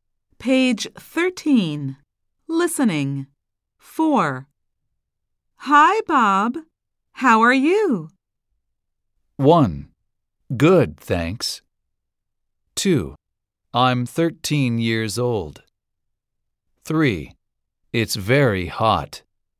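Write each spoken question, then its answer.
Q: How are you?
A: 1: Good, thanks.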